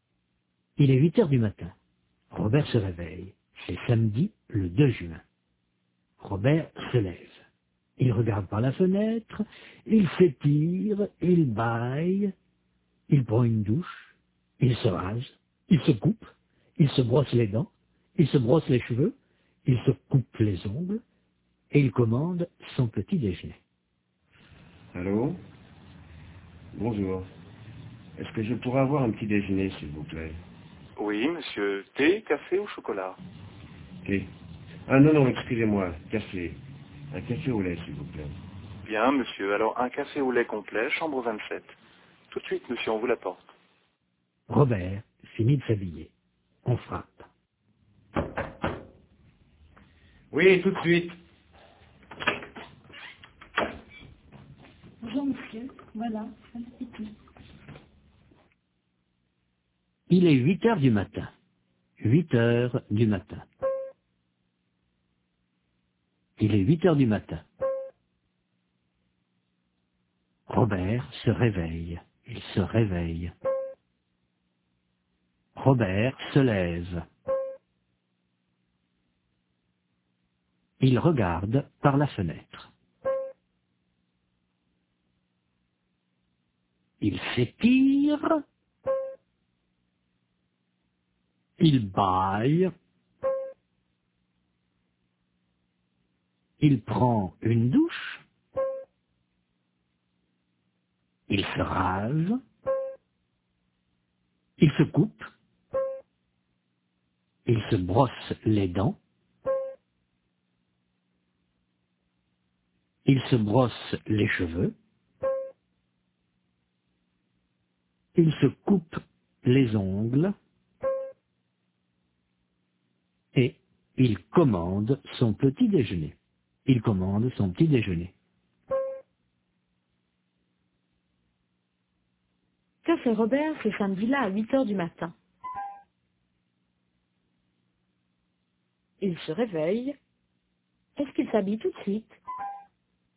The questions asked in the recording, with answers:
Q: Est-ce qu'il s'habille tout de suite?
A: Non, il regarde par la fenêtre, il s'étire, il baille, il prend une douche, il se rase, il se brosse les dents, il se brosse les cheveux, il se coupe les ongles.